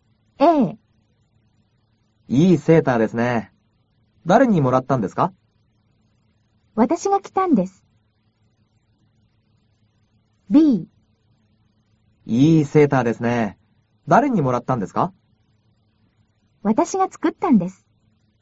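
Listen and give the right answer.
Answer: B: 私が作ったんです。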